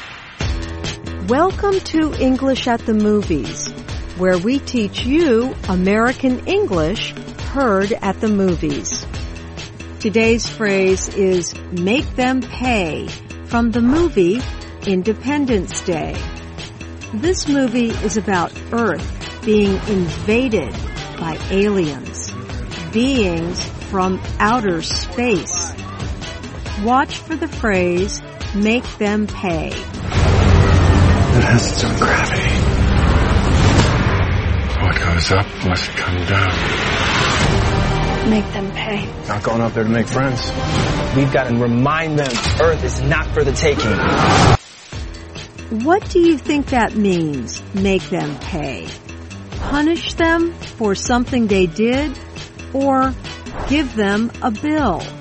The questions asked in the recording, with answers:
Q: What do you think that means, make them pay?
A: Make them pay means punish them for something they did.